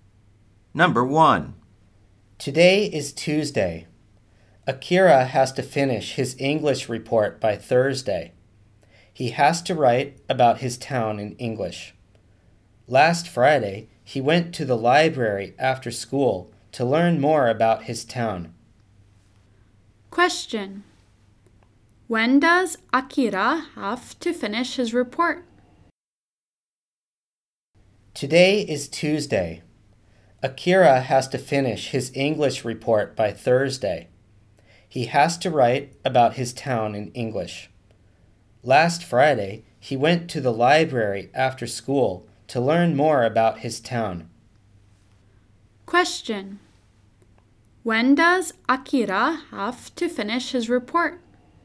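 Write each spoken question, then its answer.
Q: When does Akira have to finish his report?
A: By Thursday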